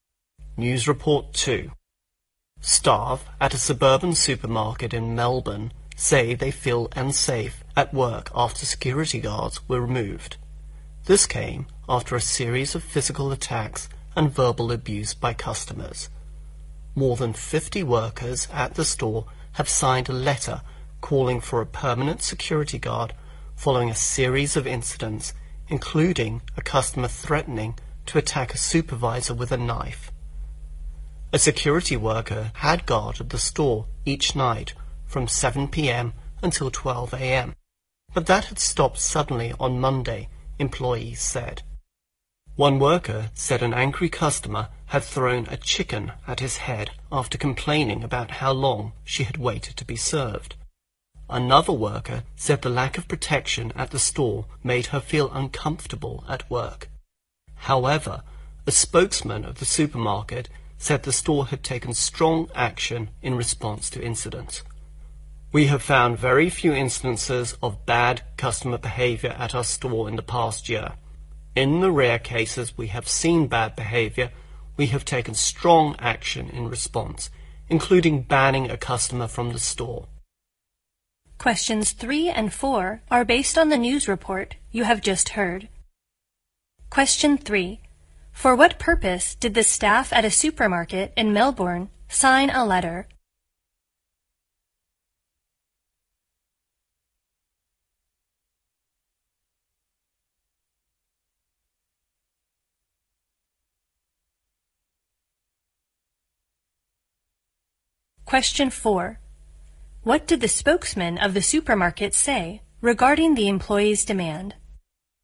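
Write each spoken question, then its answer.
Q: For what purpose did the staff at a supermarket in Melbourne sign a letter?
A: To call for a permanent security guard

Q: What did the spokesman of the supermarket say regarding the employee's demand?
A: The store had taken strong action in response to incidents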